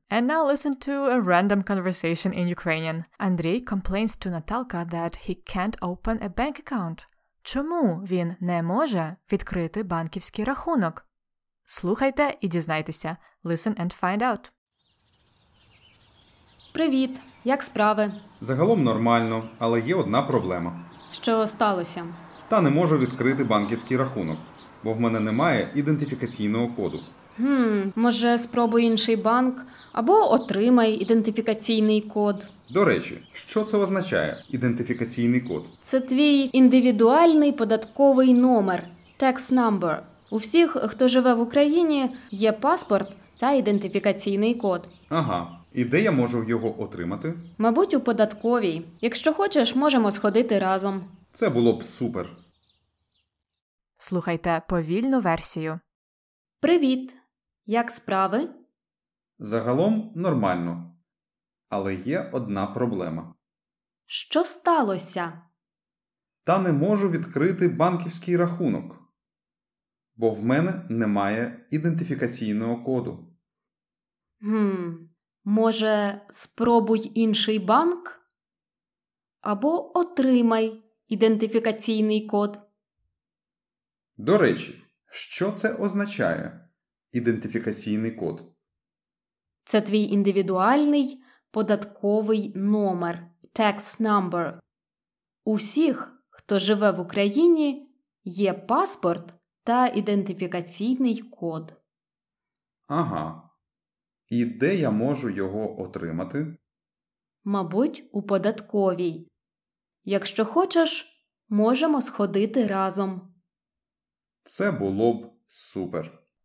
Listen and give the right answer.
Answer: Він не може відкрити банківський рахунок, бо в нього немає ідентифікаційного коду.